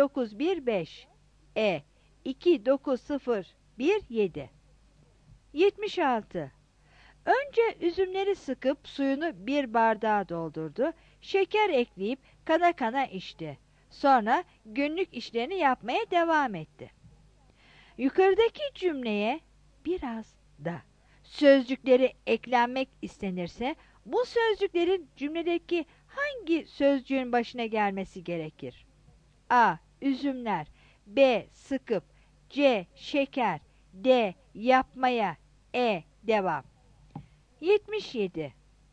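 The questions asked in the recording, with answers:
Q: Yukarıdaki cümleye biraz da sözcükleri eklenmek istenirse bu sözcüklerin cümledeki hangi sözcüğün başına gelmesi gerekir?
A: C: Şeker.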